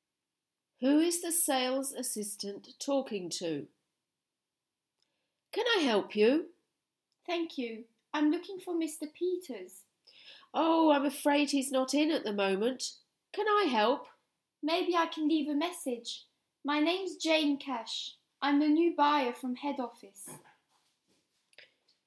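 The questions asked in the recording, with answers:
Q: Who is the sales assistant talking to?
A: Jane Cash, the new buyer from head office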